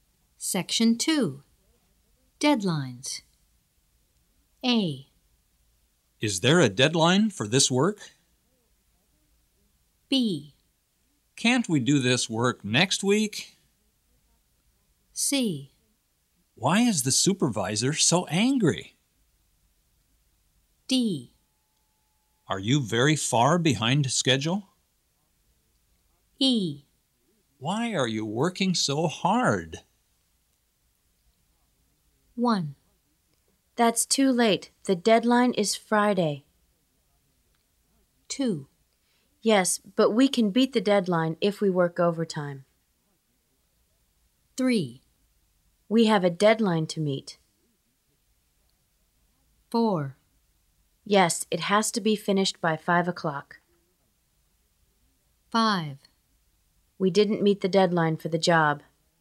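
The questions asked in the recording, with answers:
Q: That's too late. The deadline is Friday.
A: B: Can't we do this work next week?

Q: Yes, but we can beat the deadline if we work overtime.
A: D: Are you very far behind schedule?

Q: We have a deadline to meet.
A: E: Why are you working so hard?

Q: Yes, it has to be finished by 5 o'clock.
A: A: Is there a deadline for this work?

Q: We didn't meet the deadline for the job.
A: C: Why is the supervisor so angry?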